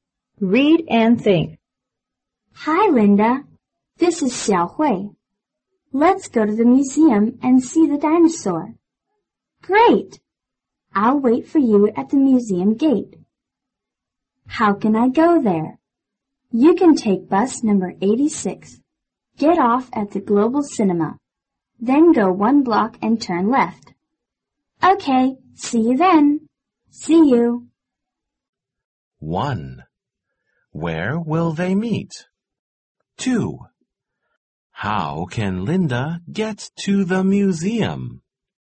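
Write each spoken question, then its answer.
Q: Where will they meet?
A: At the museum gate.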